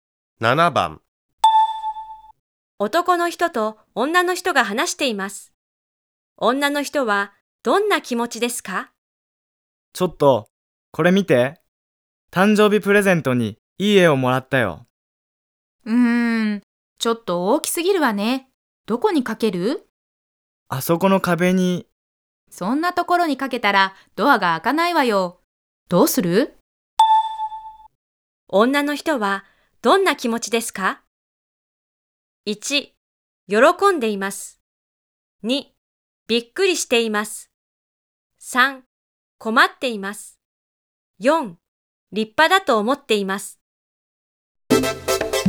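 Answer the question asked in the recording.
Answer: 3: 困っています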